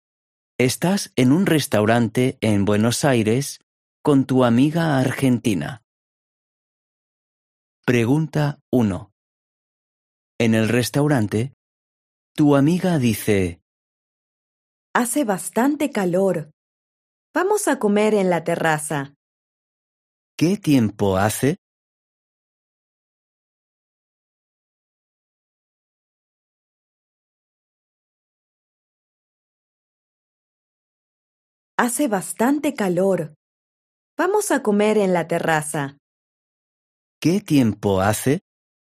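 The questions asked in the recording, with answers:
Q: ¿Qué tiempo hace?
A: Hace bastante calor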